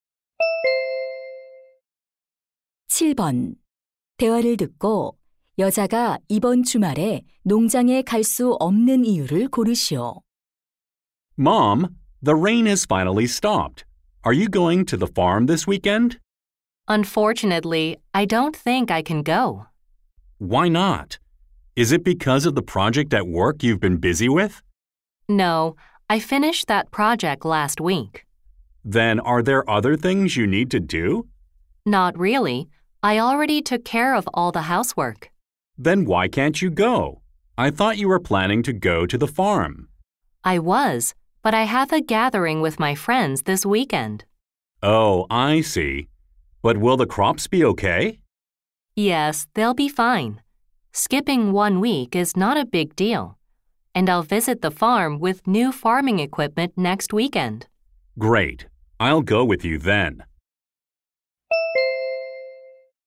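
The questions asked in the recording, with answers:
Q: 대화를 듣고 여자가 이번 주말에 농장에 갈 수 없는 이유를 고르시오.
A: 친구들과의 모임이 있어서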